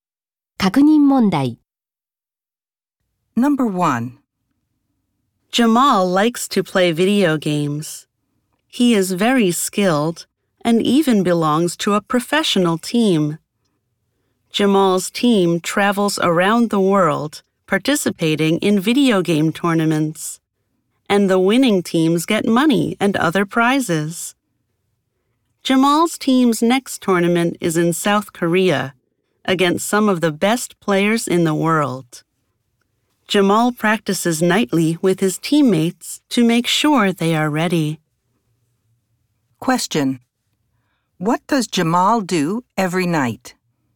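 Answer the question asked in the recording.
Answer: He practices with his teammates.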